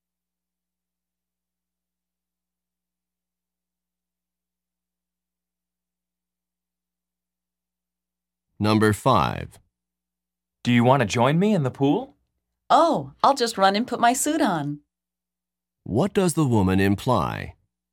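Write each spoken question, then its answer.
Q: What does the woman imply?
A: She will join him in the pool after putting on her swimsuit.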